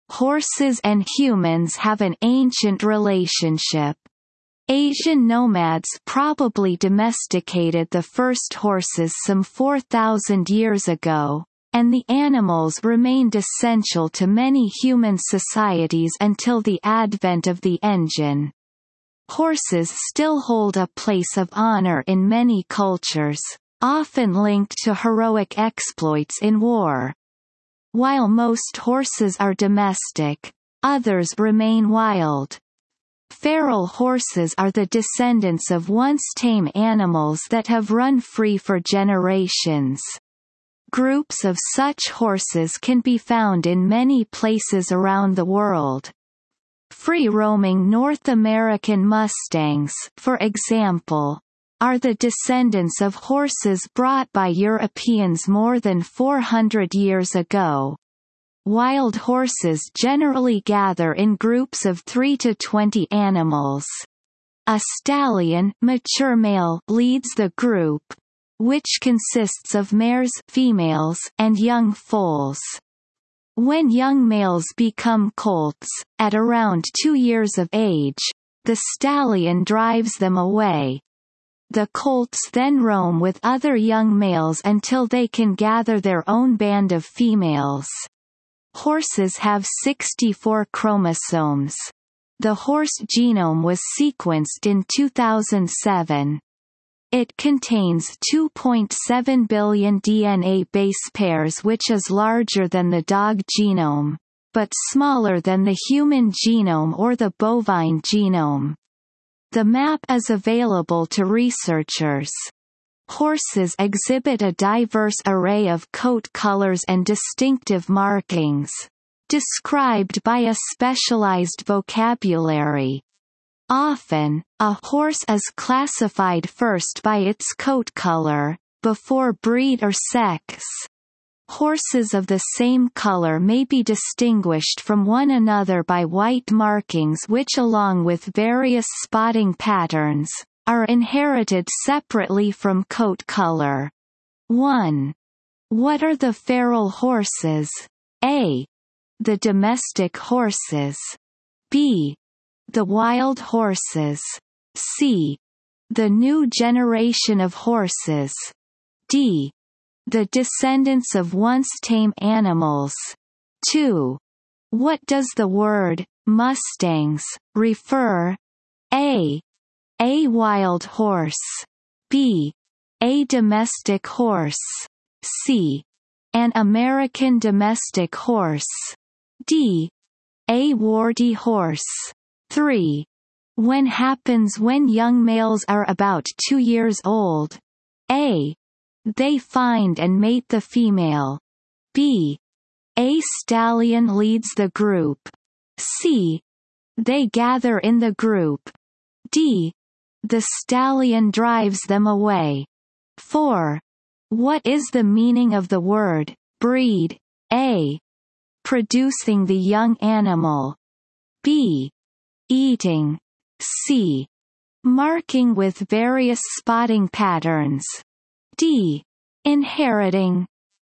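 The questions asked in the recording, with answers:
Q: What are the feral horses?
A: D: The descendants of once tame animals.

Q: What does the word Mustangs refer?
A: A: A wild horse.

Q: When happens when young males are about 2 years old?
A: D: The stallion drives them away.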